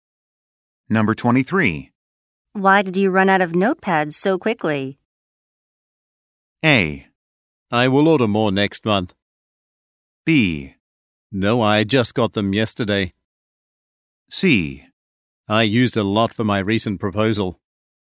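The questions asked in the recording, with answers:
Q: Why did you run out of notepads so quickly?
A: C: I used a lot for my recent proposal.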